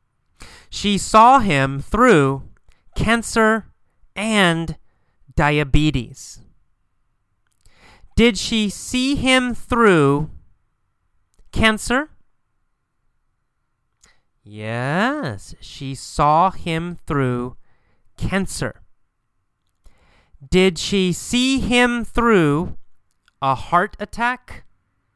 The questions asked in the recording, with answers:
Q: Did she see him through a heart attack?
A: No. Not a heart attack. She didn't see him through a heart attack.